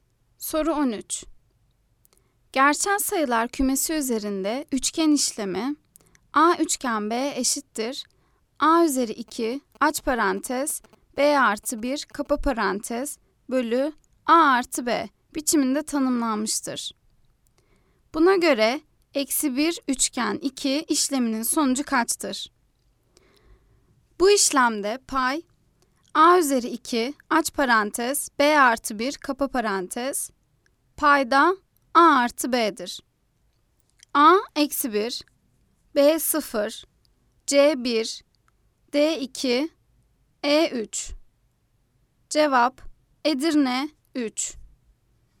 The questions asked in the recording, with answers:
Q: Buna göre eksi 1 üçgen 2 işleminin sonucu kaçtır?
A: Cevap Edirne 3.